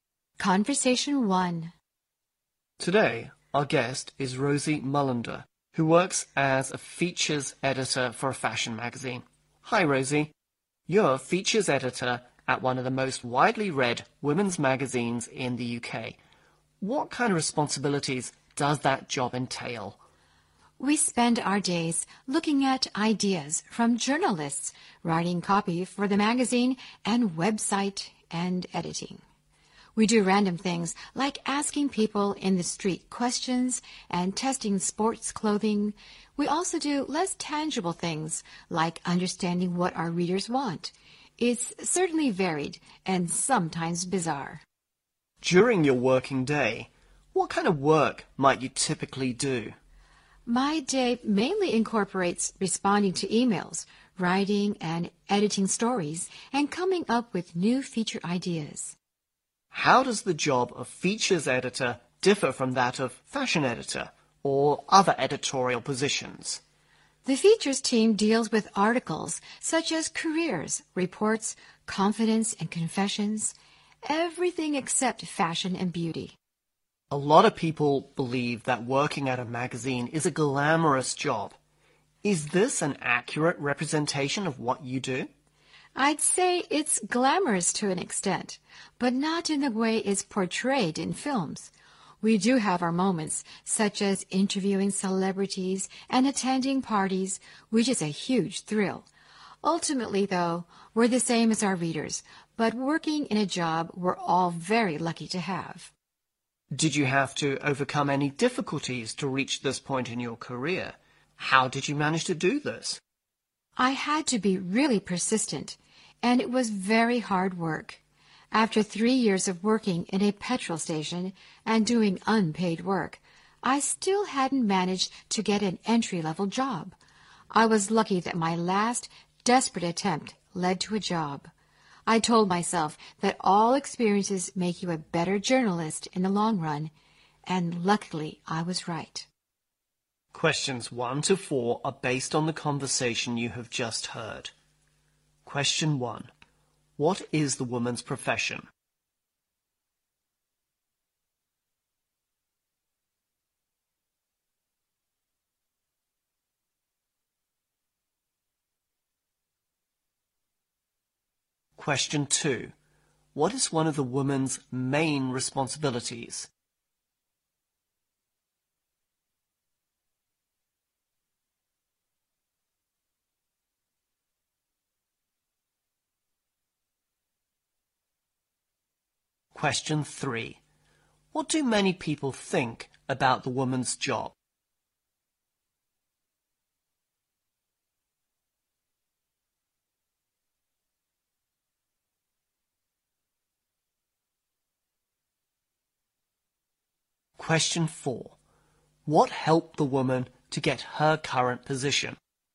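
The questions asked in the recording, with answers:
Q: What is the woman's profession?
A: Features editor at a fashion magazine

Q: What is one of the woman's main responsibilities?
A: Writing and editing stories and coming up with new feature ideas

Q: What do many people think about the woman's job?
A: It is glamorous

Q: What helped the woman to get her current position?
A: Her persistence and hard work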